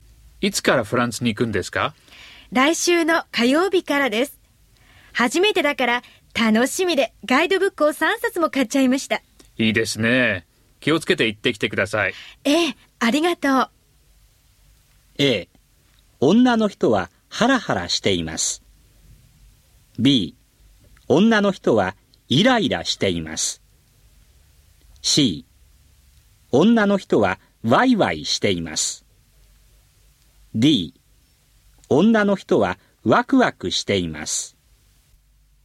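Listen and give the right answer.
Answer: D: 女の人はワクワクしています。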